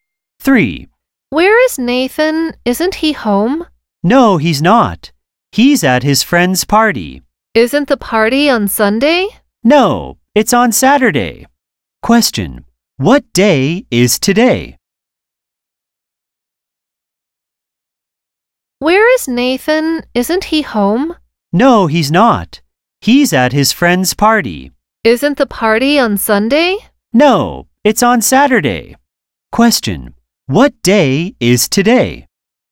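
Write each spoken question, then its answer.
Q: What day is today?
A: Saturday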